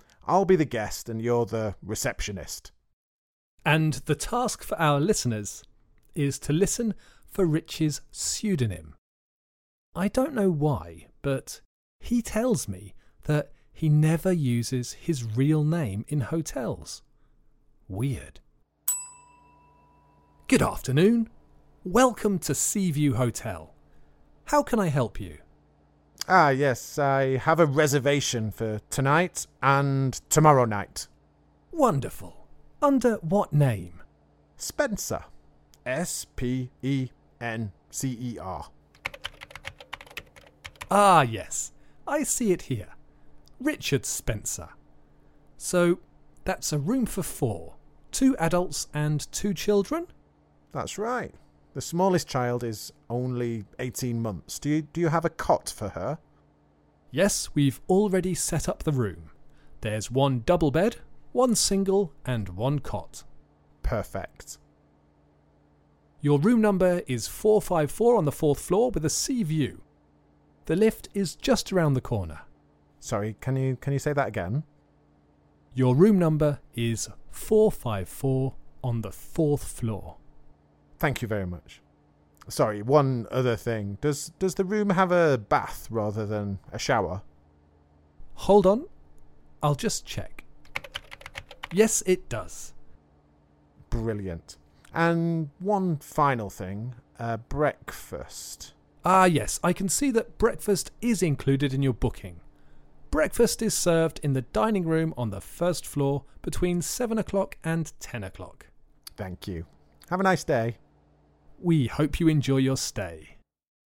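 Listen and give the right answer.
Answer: Richard Spencer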